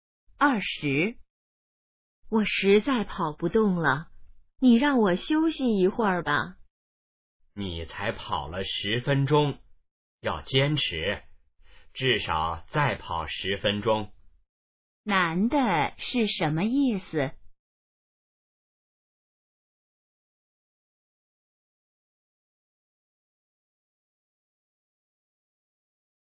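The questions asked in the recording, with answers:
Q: 男的是什么意思?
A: 要坚持,再跑10分钟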